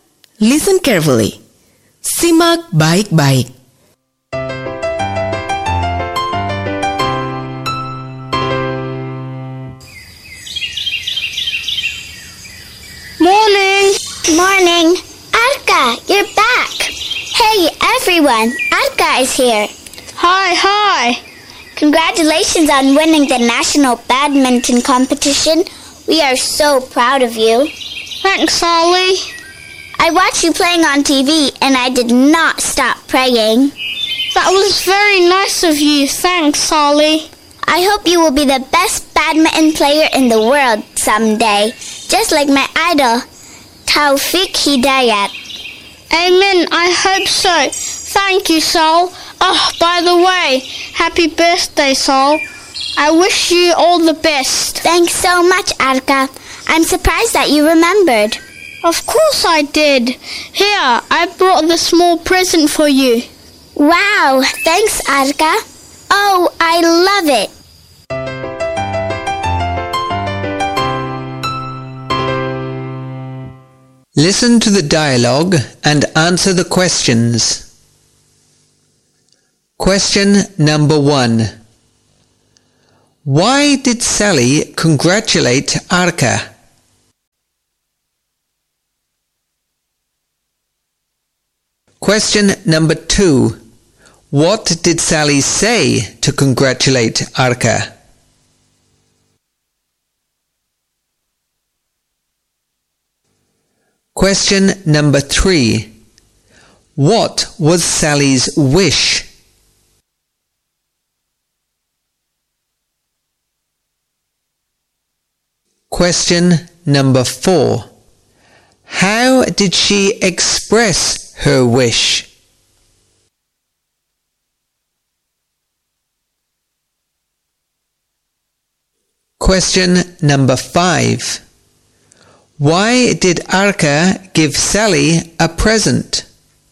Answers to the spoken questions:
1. because he won a badminton competition.
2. congratulations on winning the national badminton competition.
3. she hopes that Arka will be the best badminton player in the world.
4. I hope you will be the best badminton player in the world someday, just like my idol, Taufik Hidayat.
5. because it was Sally's birthday.